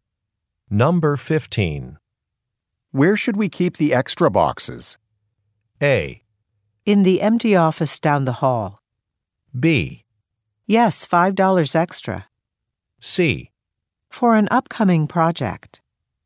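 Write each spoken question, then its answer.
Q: Where should we keep the extra boxes?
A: A: In the empty office down the hall.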